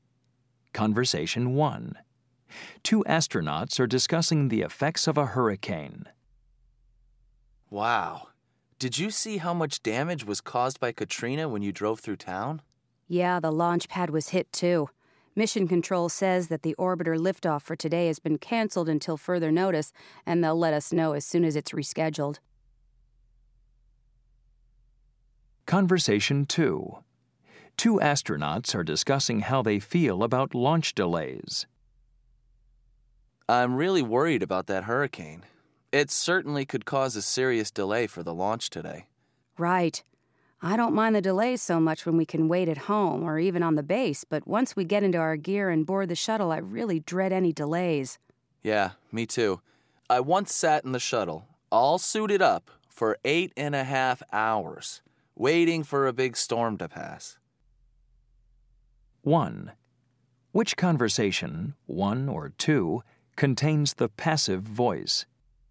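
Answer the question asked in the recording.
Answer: Conversation 1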